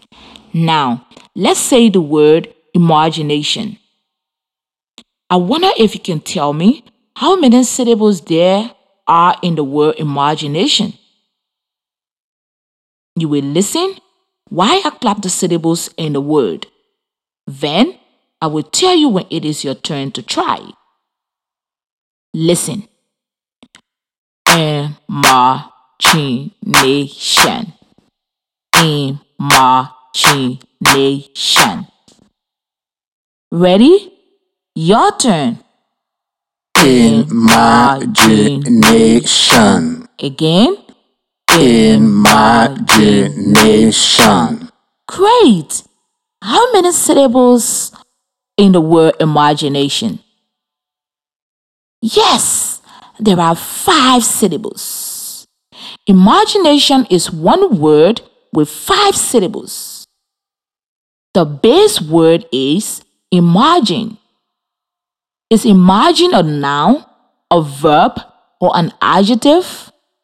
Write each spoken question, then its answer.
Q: How many syllables in the word imagination?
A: Yes! There are 5 syllables.